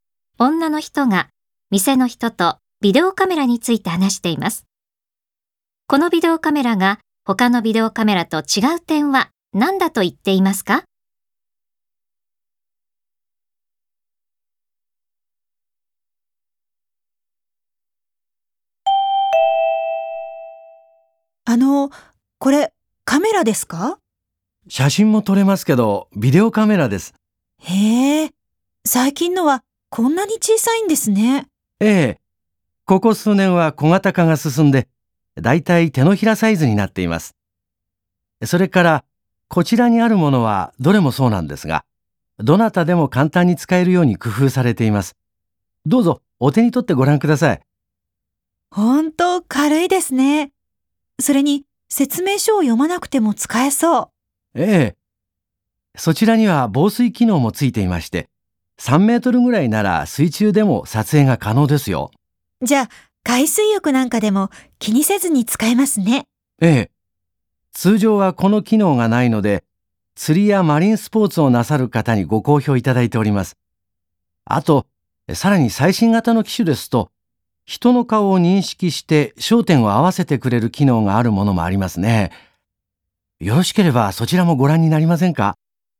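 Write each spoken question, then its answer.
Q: このビデオカメラが他のビデオカメラと違う点は何だと言っていますか?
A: 防水機能がついていて、水中でも撮影できる点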